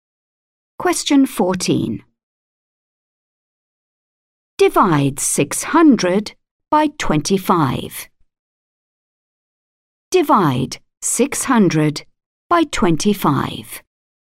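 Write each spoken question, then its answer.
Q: Divide 600 by 25.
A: 24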